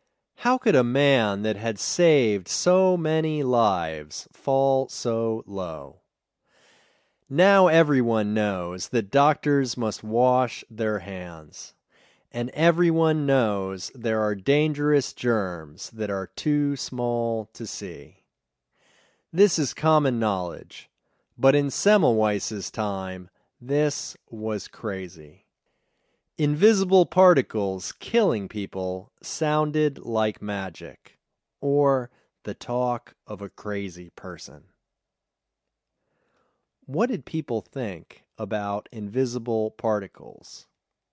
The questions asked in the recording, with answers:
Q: What did people think about invisible particles?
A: They thought it sounded like magic or the talk of a crazy person.